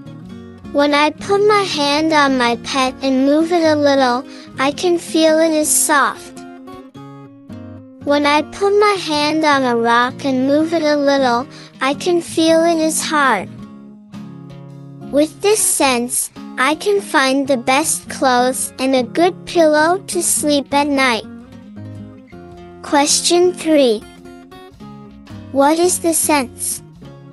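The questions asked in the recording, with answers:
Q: What is the sense?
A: Touch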